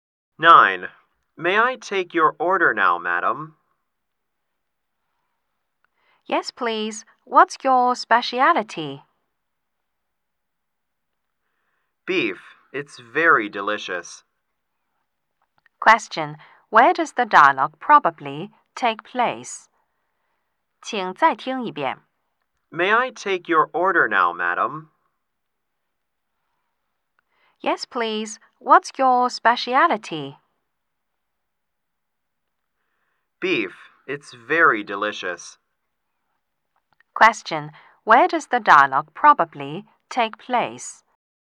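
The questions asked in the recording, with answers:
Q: Question. Where does the dialogue probably take place?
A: In a restaurant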